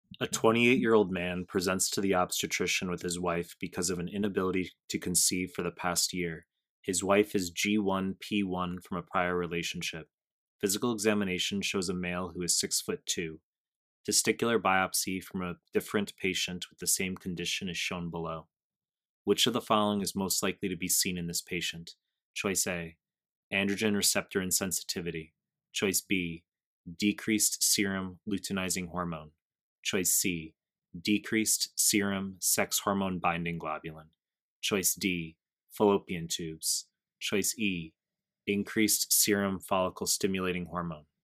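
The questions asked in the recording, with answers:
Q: Which of the following is most likely to be seen in this patient?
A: E: increased serum follicle stimulating hormone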